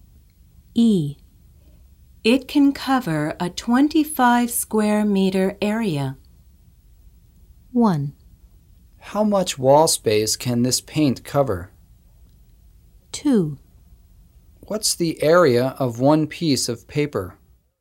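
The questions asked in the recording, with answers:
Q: It can cover a 25 square meter area.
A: 1: How much wall space can this paint cover?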